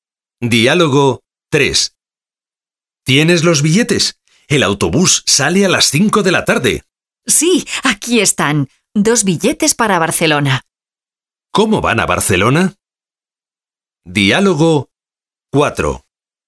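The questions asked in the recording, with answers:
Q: ¿Cómo van a Barcelona?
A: En autobús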